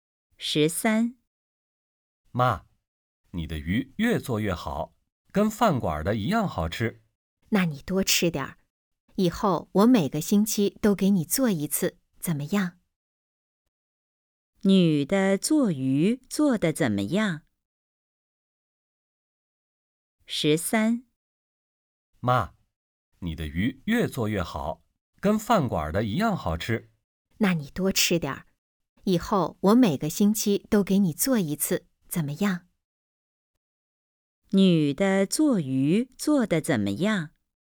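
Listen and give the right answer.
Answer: 越做越好,跟饭馆的一样好吃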